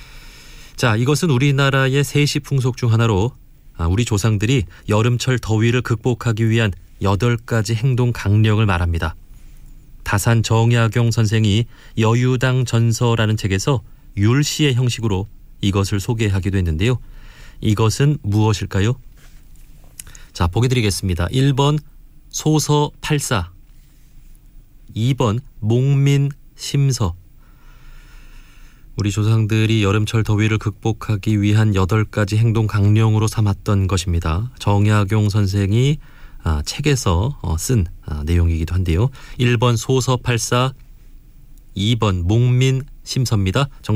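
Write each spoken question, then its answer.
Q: 이것은 무엇일까요?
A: 1: 소서 팔사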